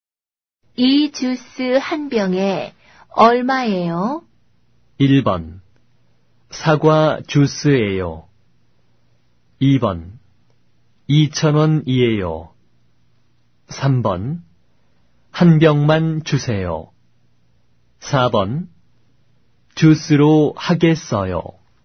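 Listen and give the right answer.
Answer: 2: 2,000원이에요.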